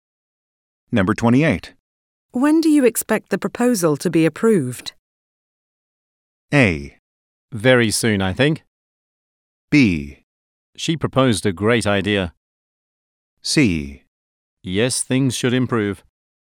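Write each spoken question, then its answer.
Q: When do you expect the proposal to be approved?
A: A: Very soon, I think.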